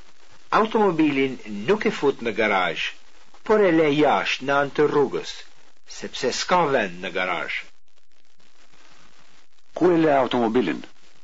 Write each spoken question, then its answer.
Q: Ku e le automobilin?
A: E le automobilin jashtë në anë të rrugës.